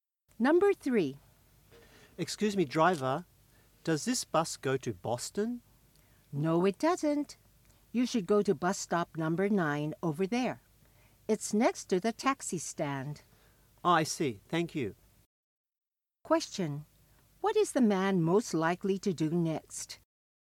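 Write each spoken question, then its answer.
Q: What is the man most likely to do next?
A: Go to bus stop number 9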